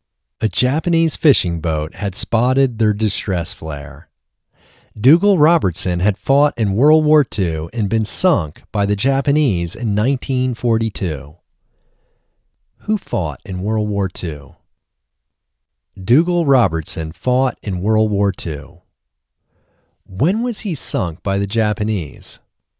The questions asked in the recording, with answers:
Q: When was he sunk by the Japanese?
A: He was sunk by the Japanese in 1942.